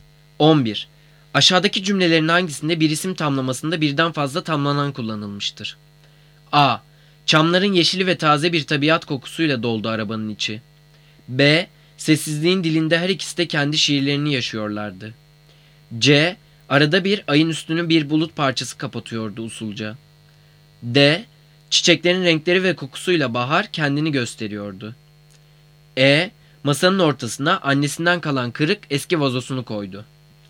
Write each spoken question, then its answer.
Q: Aşağıdaki cümlelerin hangisinde bir isim tamlamasında birden fazla tamlanan kullanılmıştır?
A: Cevap D. Çiçeklerin renkleri ve kokusuyla bahar kendini gösteriyordu.